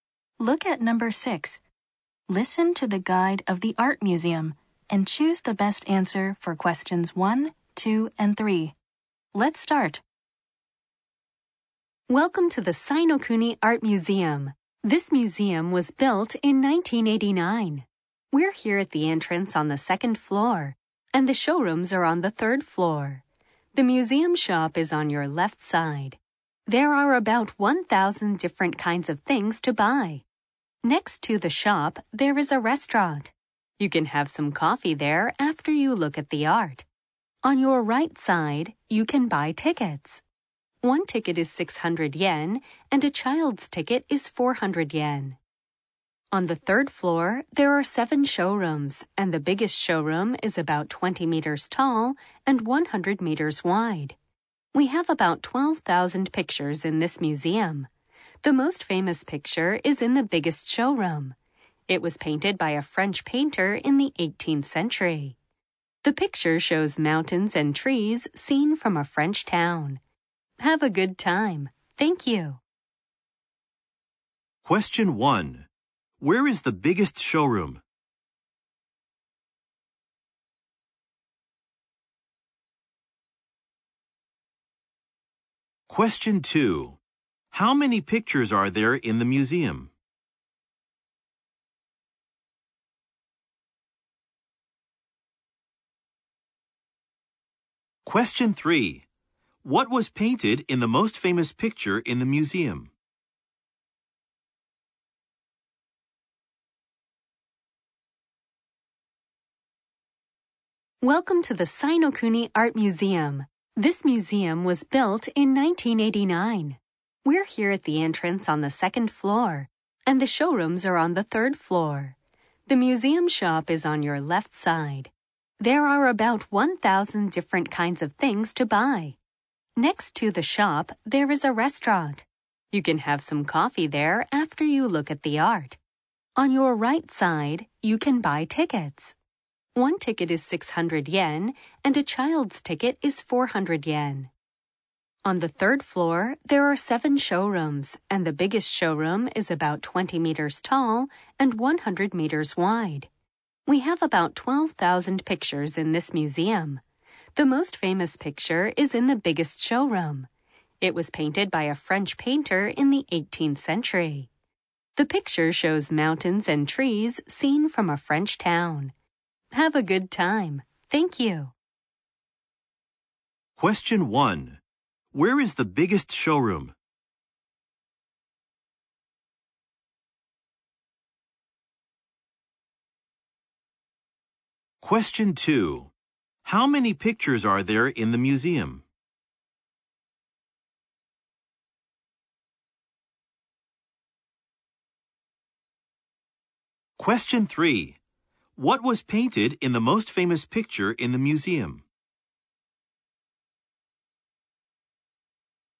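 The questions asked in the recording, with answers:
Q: Where is the biggest showroom?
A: On the third floor

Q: How many pictures are there in the museum?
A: About 12,000

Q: What was painted in the most famous picture in the museum?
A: Mountains and trees seen from a French town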